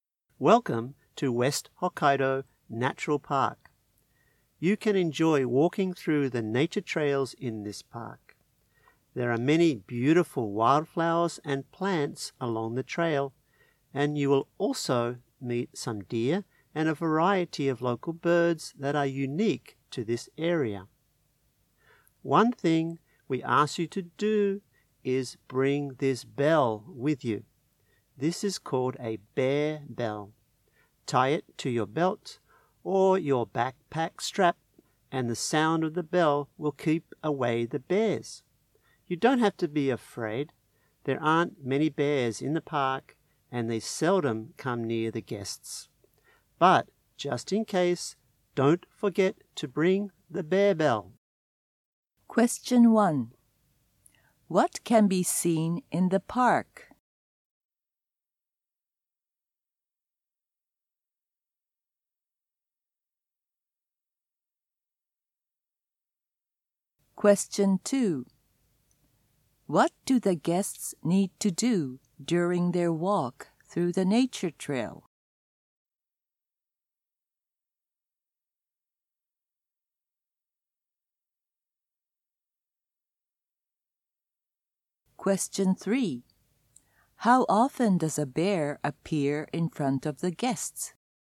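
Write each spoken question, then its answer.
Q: What can be seen in the park?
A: Wildflowers, plants, deer and local birds

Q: What do the guests need to do during their walk through the nature trail?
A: Bring a bear bell tied to their belt or backpack strap.

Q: How often does a bear appear in front of the guests?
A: Seldom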